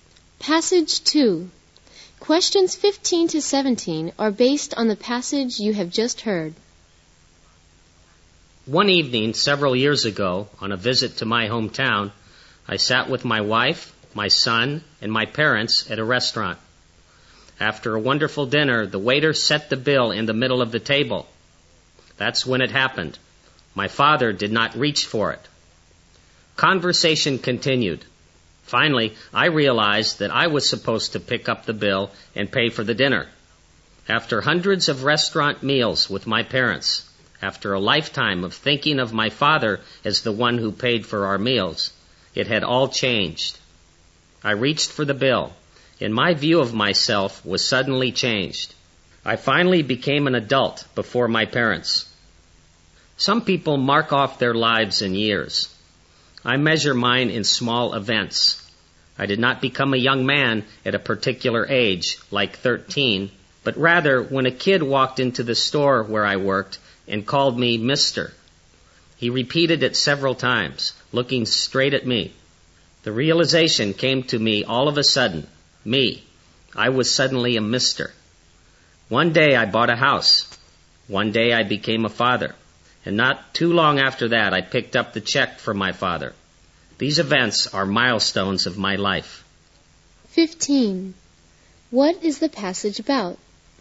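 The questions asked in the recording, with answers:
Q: What is the passage about?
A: Small events that mark milestones in his life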